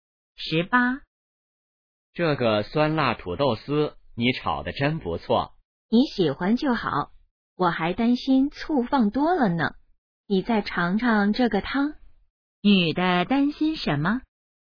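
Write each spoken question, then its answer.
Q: 女的担心什么?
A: 醋放多了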